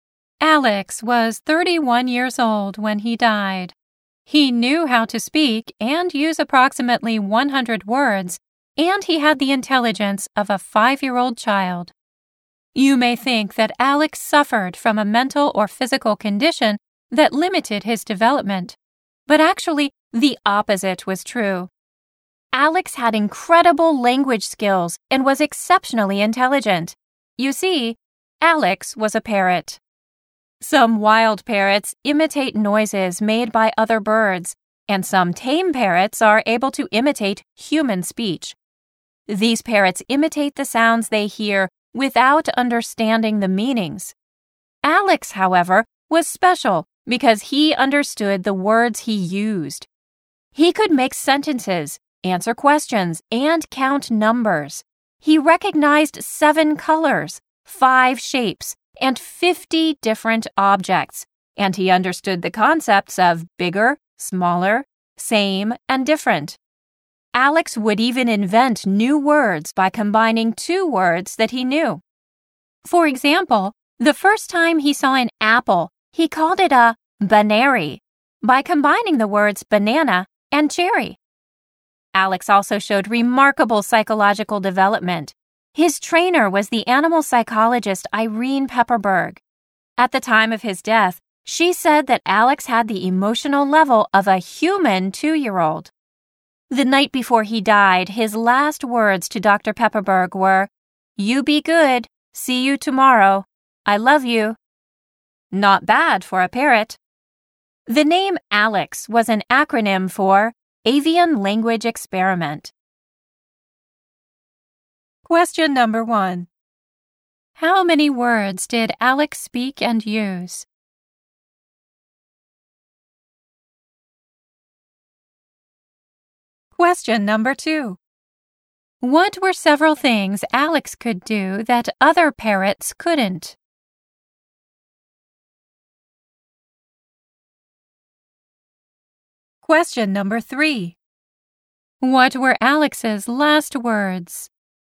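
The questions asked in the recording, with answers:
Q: How many words did Alex speak and use?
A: About 100 words.

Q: What were several things Alex could do that other parrots couldn't?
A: He understood the words he used; he could make sentences, answer questions and count numbers.

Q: What were Alex's last words?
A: "You be good. See you tomorrow. I love you."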